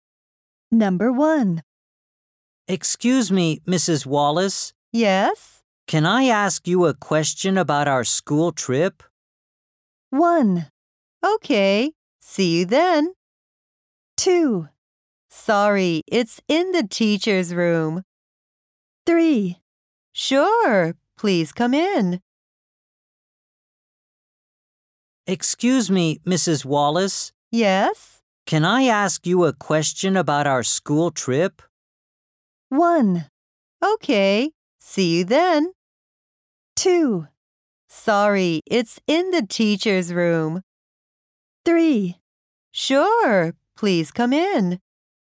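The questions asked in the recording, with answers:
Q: Can I ask you a question about our school trip?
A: 3: Sure, please come in.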